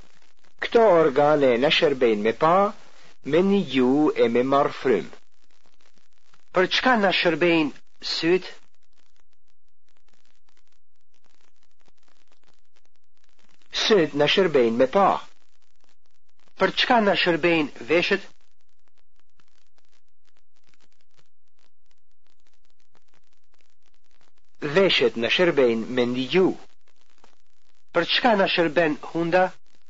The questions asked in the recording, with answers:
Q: Për çka në shërbejnë syt?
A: Syt në shërbejnë me pa.

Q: Për çka në shërbejnë hunda?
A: Hunda na shërben me marë frym.